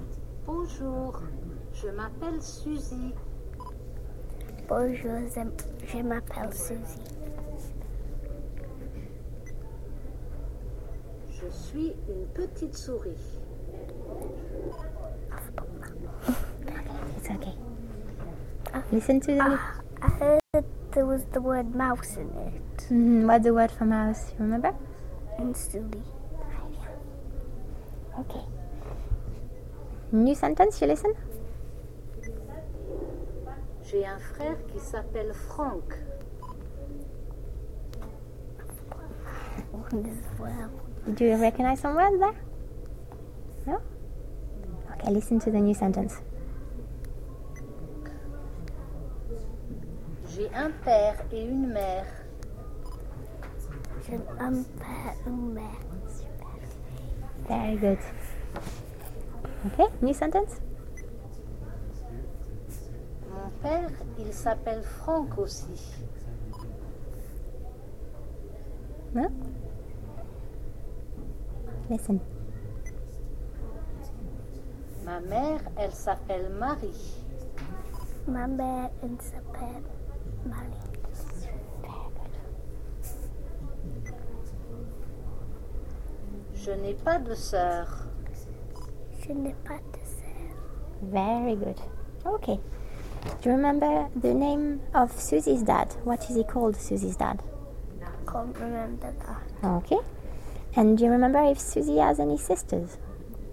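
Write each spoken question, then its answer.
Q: Do you remember the name of Susie's dad?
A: Franck

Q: And do you remember if Suzy has any sisters?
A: No, she has no sisters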